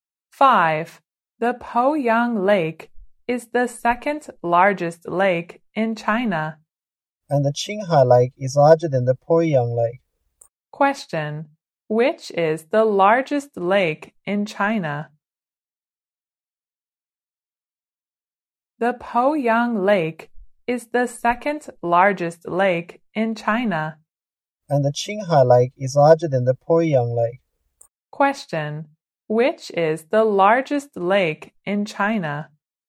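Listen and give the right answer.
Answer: The Qinghai Lake.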